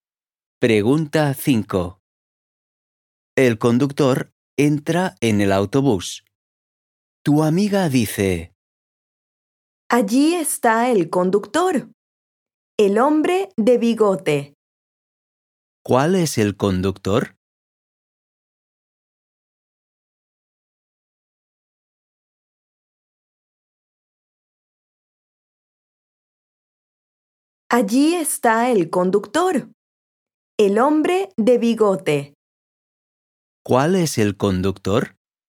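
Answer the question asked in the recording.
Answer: El hombre de bigote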